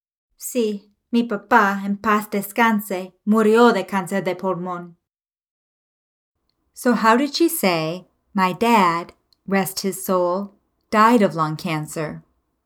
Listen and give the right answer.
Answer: Mi papá, en paz descanse, murió de cáncer de pulmón.